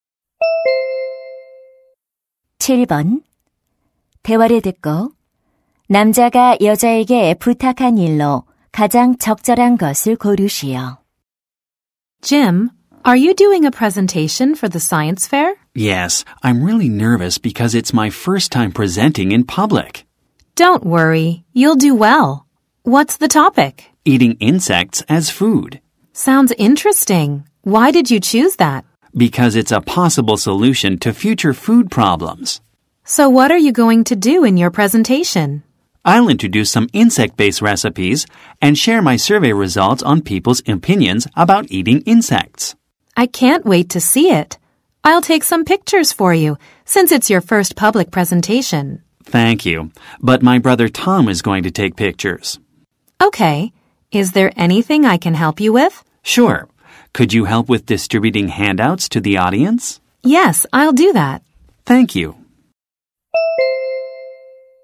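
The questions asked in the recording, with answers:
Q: 대화를 듣고 남자가 여자에게 부탁한 일로 가장 적절한 것을 고르시오.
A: 청중에게 유인물 나눠 주기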